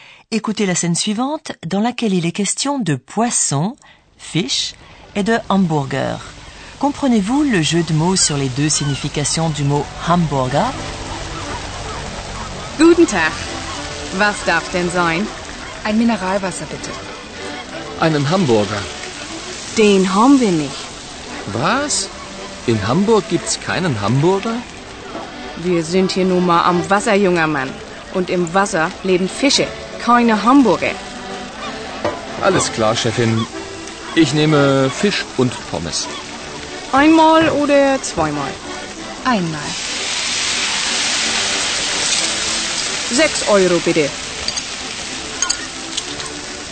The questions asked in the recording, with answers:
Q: Comprenez-vous le jeu de mots sur les deux significations du mot hamburger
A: Comme vous le savez, la scène se déroule à Hambourg et on appelle les habitants de la ville Hamburger.